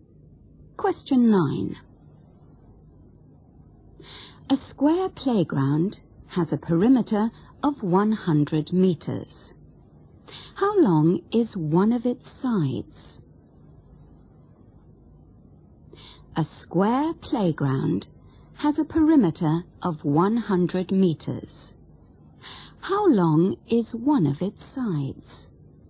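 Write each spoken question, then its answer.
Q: How long is one of its sides?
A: 25 meters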